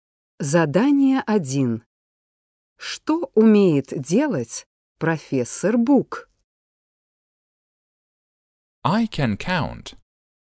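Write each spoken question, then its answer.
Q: Что умеет делать профессор Бук?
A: Считать (I can count)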